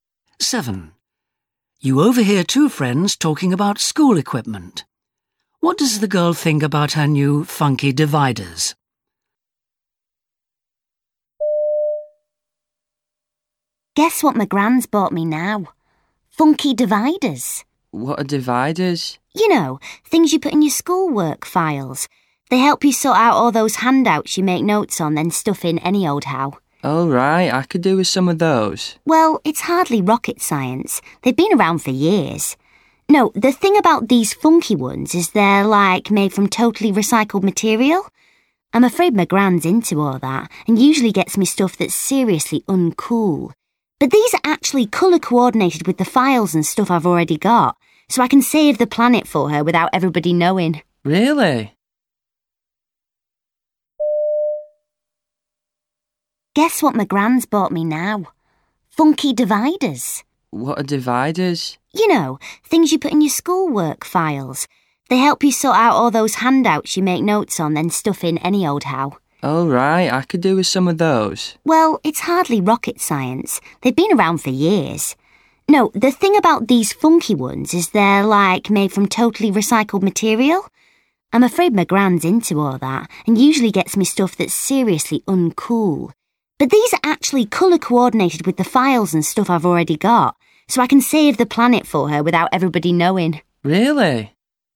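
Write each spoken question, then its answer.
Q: What does the girl think about her new funky dividers?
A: She likes that they match her other things, so nobody knows they're recycled.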